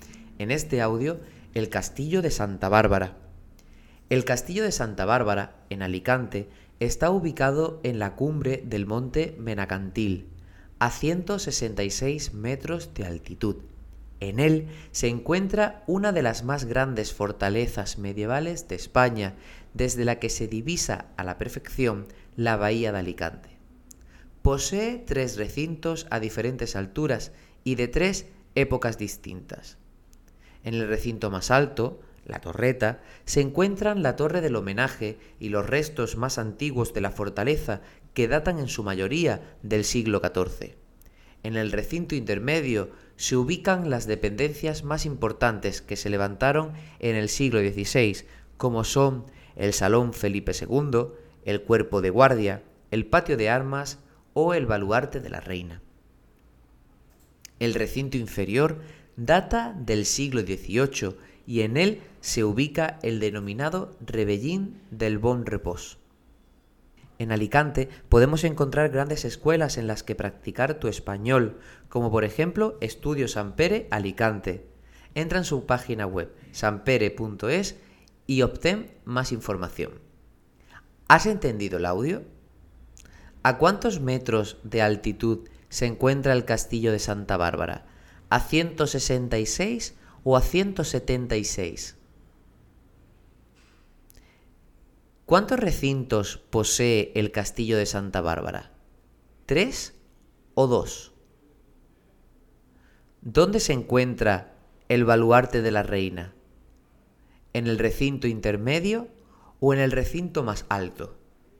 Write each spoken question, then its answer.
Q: ¿A cuántos metros de altitud se encuentra el castillo de Santa Bárbara?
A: El castillo de Santa Bárbara se encuentra a 166 metros de altitud.

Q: ¿Cuántos recintos posee el castillo de Santa Bárbara?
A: Son tres los recintos a diferentes alturas

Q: ¿Dónde se encuentra el baluarte de la reina?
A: el baluarte de la reina se encuentra en el recinto intermedio.